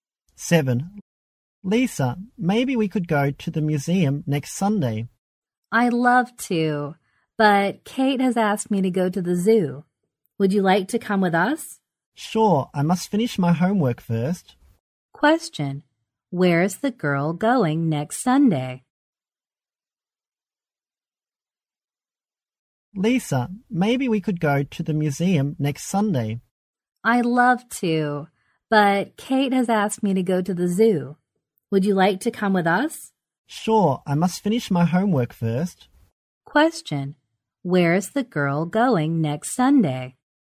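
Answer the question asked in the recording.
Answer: To the zoo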